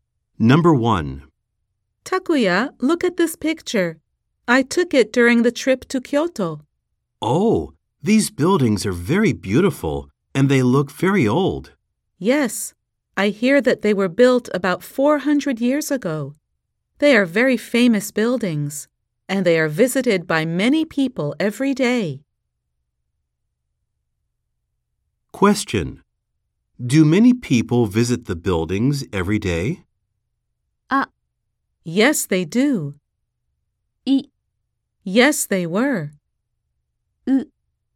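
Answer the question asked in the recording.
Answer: A: Yes, they do.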